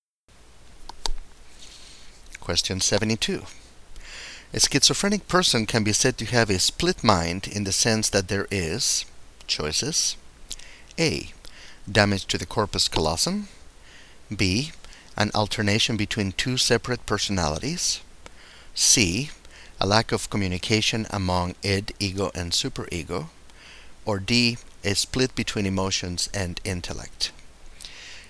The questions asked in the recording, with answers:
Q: A schizophrenic person can be said to have a split mind in the sense that there is,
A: The correct choice is D. A split between emotions and intellect.